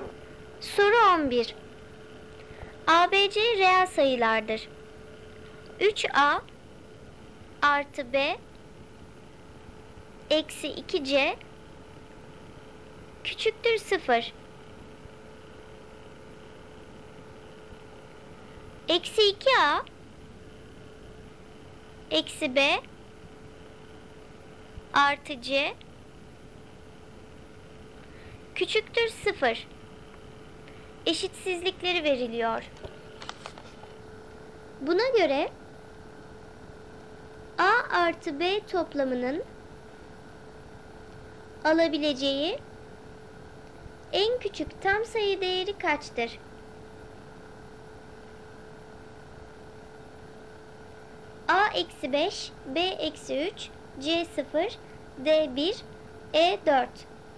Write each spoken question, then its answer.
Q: Buna göre A artı B toplamının alabileceği en küçük tam sayı değeri kaçtır?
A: Doğru cevap d 1.